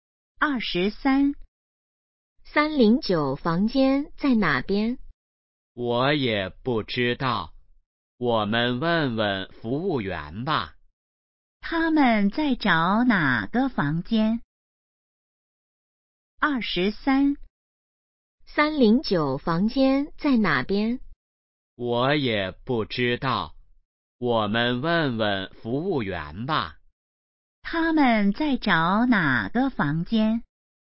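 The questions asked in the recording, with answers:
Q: 他们在找哪个房间?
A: 309房间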